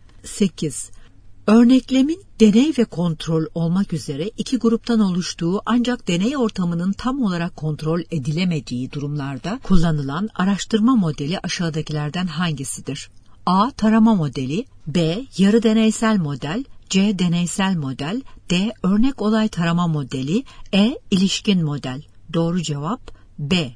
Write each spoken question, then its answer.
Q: Örneklemin deney ve kontrol olmak üzere iki gruptan oluştuğu ancak deney ortamının tam olarak kontrol edilemediği durumlarda kullanılan araştırma modeli aşağıdakilerden hangisidir?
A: Doğru cevap B.